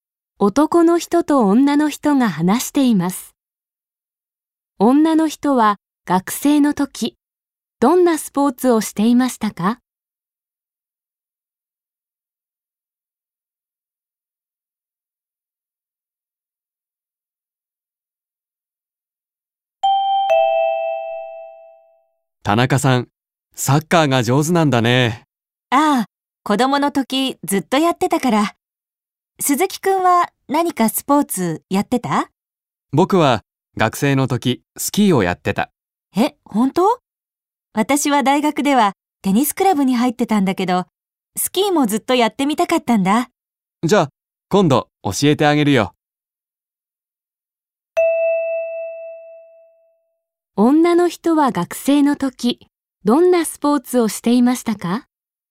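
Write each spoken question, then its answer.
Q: 女の人は学生の時どんなスポーツをしていましたか?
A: テニス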